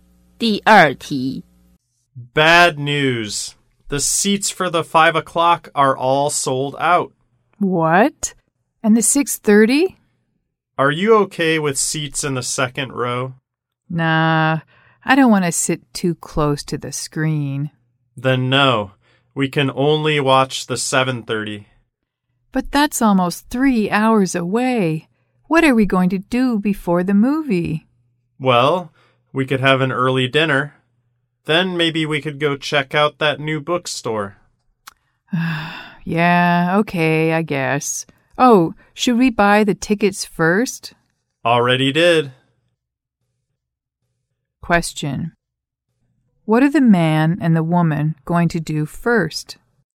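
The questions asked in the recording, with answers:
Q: What are the man and the woman going to do first?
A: Have an early dinner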